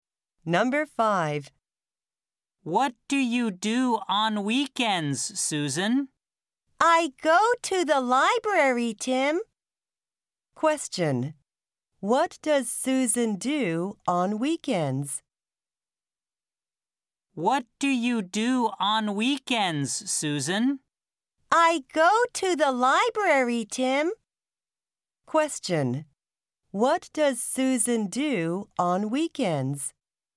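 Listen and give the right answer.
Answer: She goes to the library.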